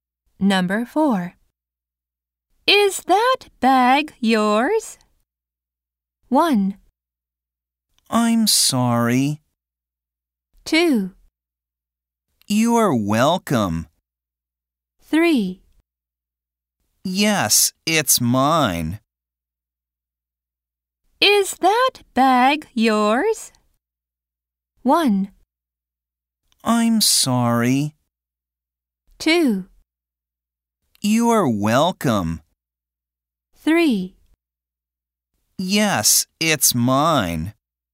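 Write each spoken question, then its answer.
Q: Is that bag yours?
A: 3: Yes, it's mine.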